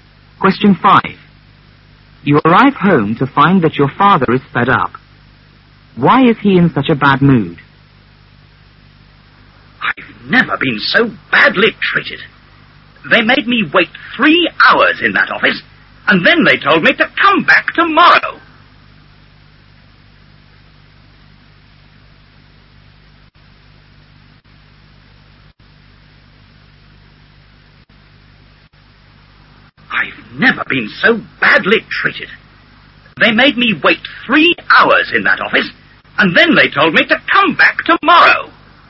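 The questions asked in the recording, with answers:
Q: Why is he in such a bad mood?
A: He waited 3 hours in an office and was told to come back tomorrow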